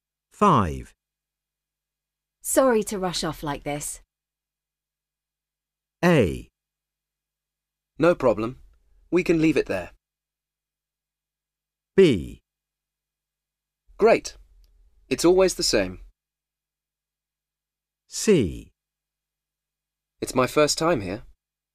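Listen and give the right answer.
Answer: A: No problem. We can leave it there.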